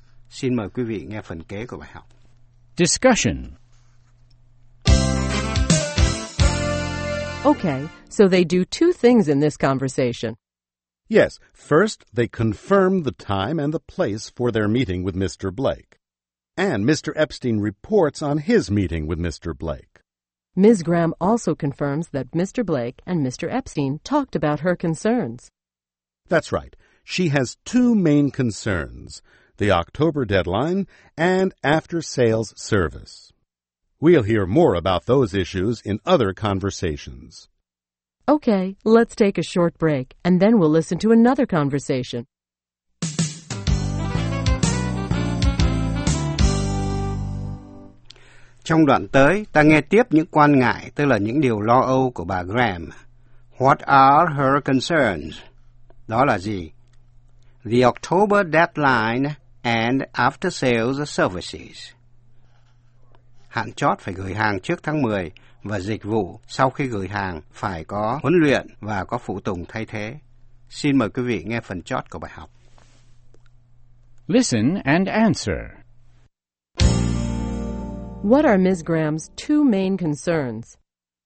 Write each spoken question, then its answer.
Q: What are Ms. Graham's two main concerns?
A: The October deadline and after-sales service.